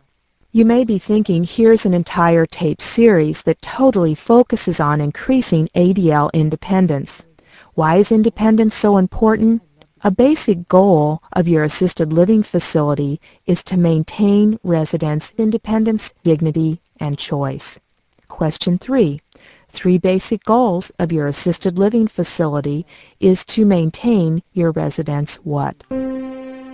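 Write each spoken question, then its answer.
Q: 3 basic goals of your assisted living facility is to maintain your residents' what?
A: Independence, dignity, and choice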